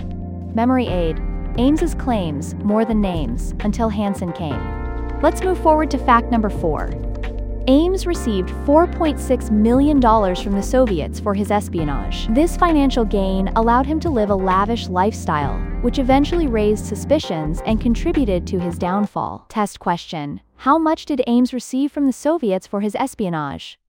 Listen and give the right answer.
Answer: Correct answer, $4.6 million.